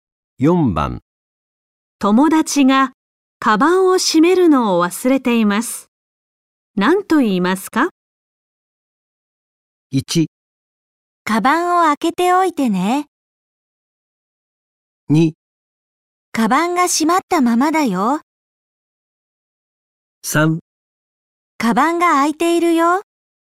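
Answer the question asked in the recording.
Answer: 3: カバンが開いているよ。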